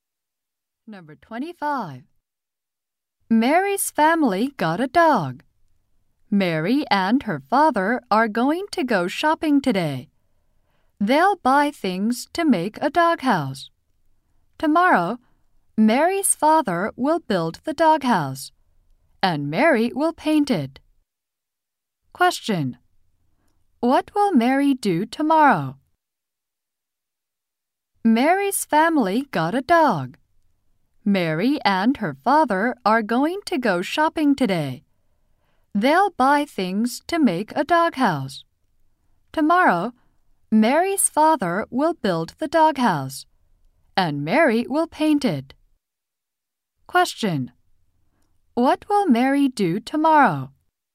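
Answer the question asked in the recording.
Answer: Paint the doghouse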